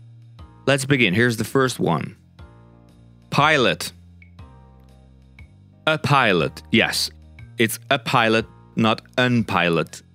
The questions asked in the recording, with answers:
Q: Pilot.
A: A pilot, yes.